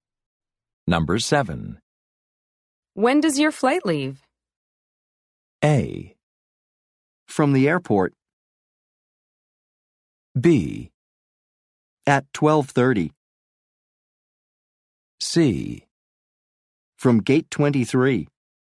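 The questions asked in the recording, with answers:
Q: When does your flight leave?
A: B: At 12:30.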